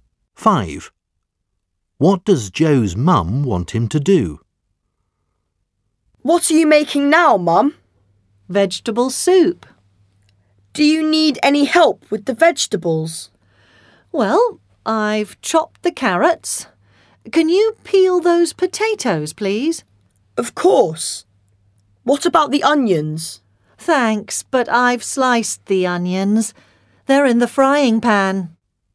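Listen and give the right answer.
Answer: Peel the potatoes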